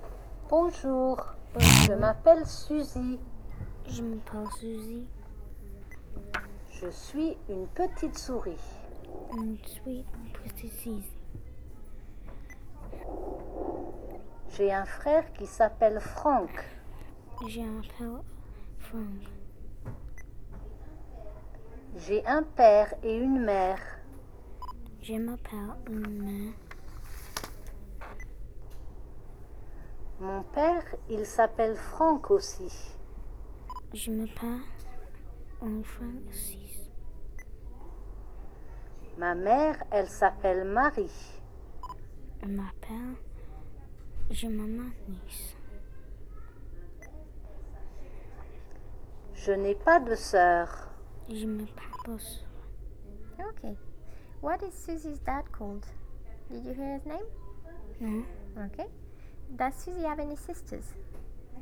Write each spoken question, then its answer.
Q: Does Susie have any sisters?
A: No? No. Good.